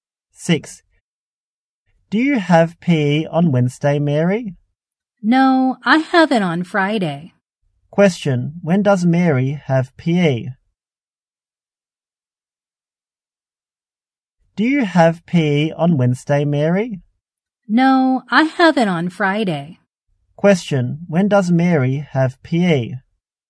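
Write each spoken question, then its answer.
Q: Question, when does Mary have PE?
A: On Friday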